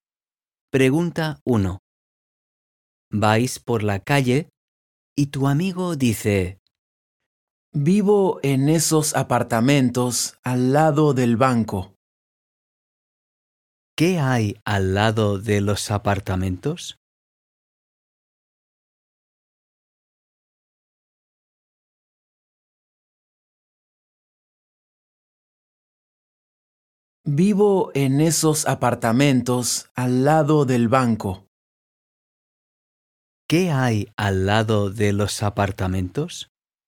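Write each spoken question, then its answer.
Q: ¿Qué hay al lado de los apartamentos?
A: el banco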